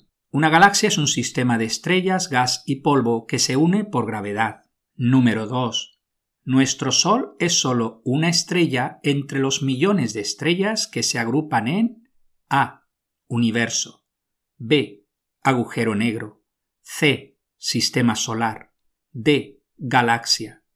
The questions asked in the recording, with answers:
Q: Nuestro Sol es solo una estrella entre los millones de estrellas que se agrupan en A.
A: La respuesta correcta es D.